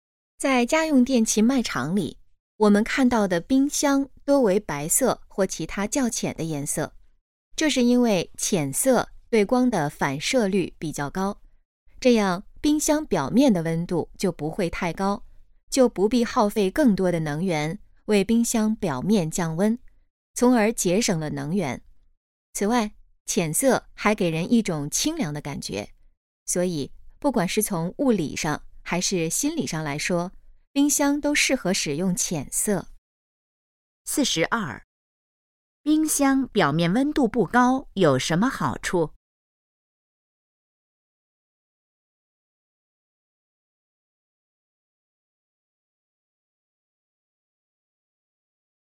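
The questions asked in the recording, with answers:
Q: 冰箱表面温度不高有什么好处?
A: 节省能源

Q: 这段话主要谈的是什么?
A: 冰箱为什么多用浅色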